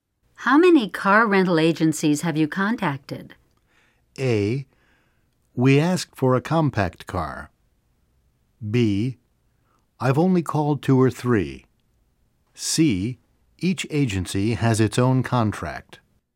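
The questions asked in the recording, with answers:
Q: How many car rental agencies have you contacted?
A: B: I've only called two or three.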